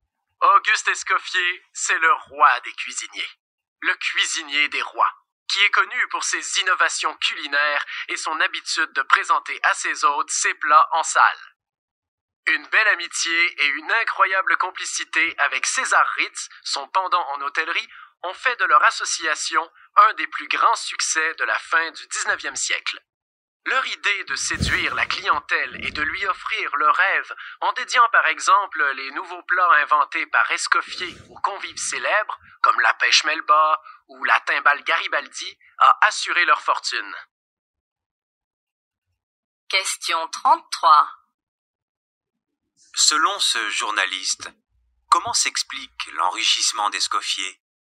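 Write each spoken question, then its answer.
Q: Selon ce journaliste, comment s'explique l'enrichissement d'Escoffier?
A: Par son idée, avec César Ritz, de séduire la clientèle en dédiant ses nouveaux plats à des convives célèbres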